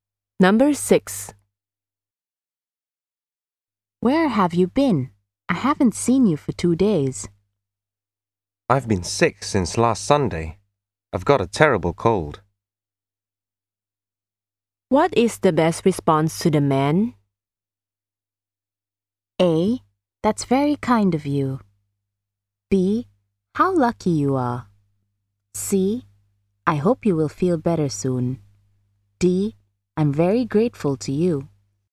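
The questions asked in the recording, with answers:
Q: What is the best response to the man?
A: C: I hope you will feel better soon.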